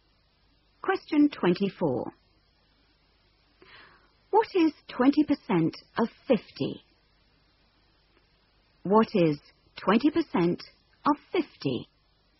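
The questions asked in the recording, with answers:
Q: What is 20% of 50?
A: 10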